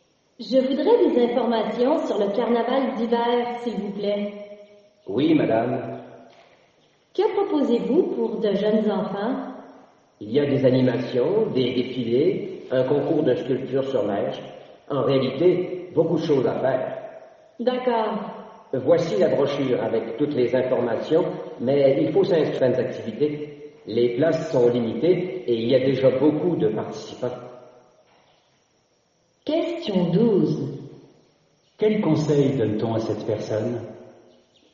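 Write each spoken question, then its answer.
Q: Quel conseil donne-t-on à cette personne?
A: De s'inscrire vite à une activité, car les places sont limitées.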